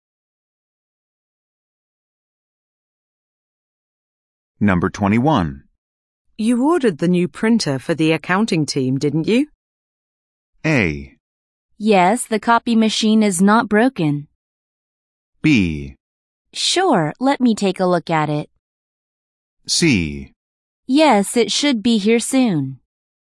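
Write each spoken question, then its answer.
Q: You ordered the new printer for the accounting team, didn't you?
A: C: Yes, it should be here soon.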